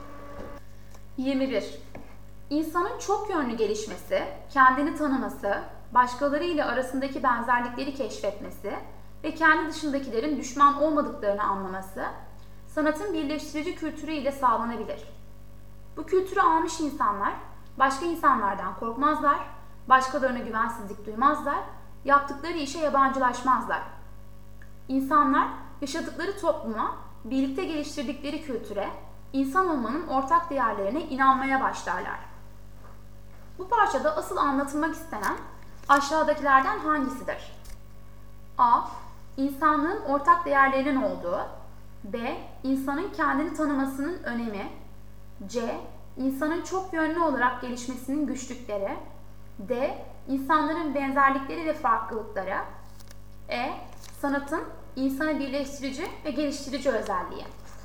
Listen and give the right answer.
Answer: Doğru yanıt E.